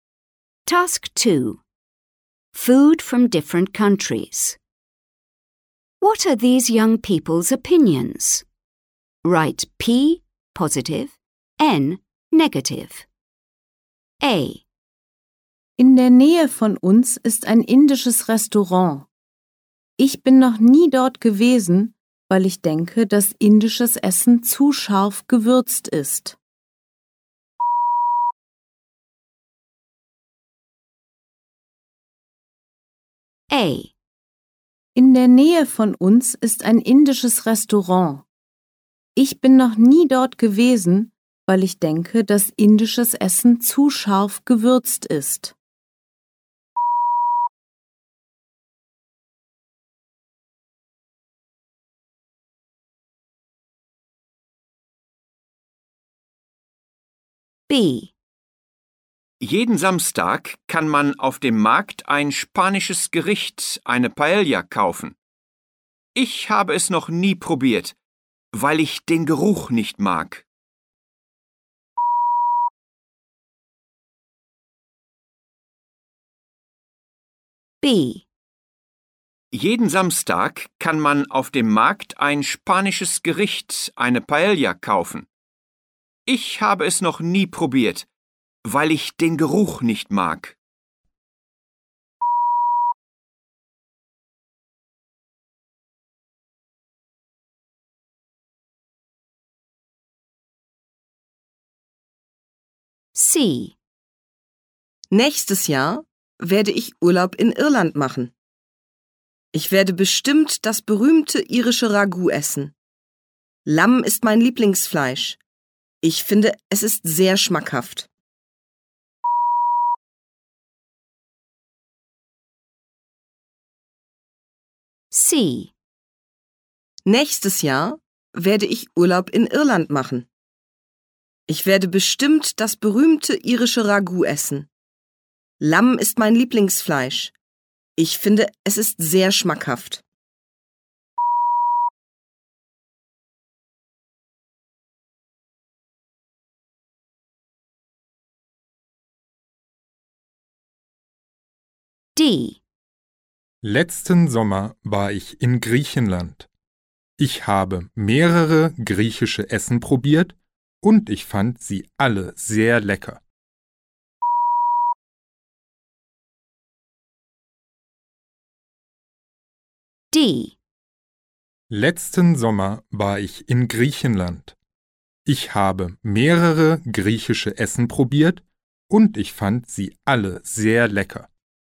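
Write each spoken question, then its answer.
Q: What are these young people's opinions?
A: N: negative

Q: What are these young people's opinions?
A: N: negative

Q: What are these young people's opinions?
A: P: positive

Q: What are these young people's opinions?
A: P: positive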